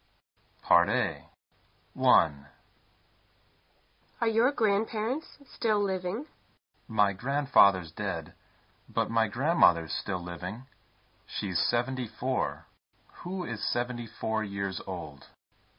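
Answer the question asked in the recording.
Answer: The speaker's grandmother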